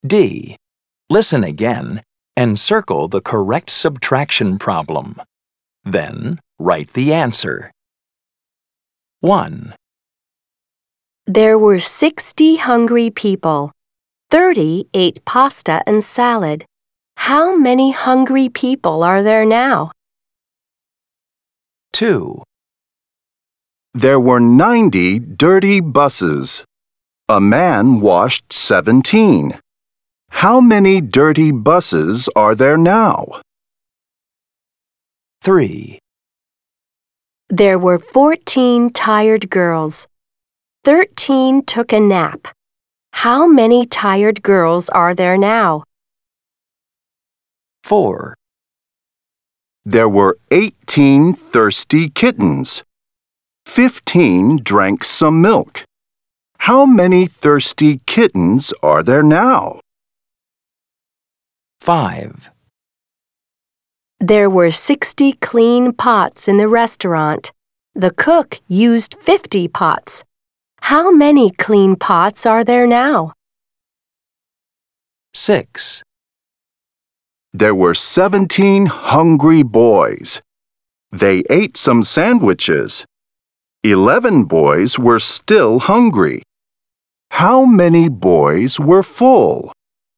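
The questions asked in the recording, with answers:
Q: How many hungry people are there now?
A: 30

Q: How many dirty buses are there now?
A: 73

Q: How many clean pots are there now?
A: 10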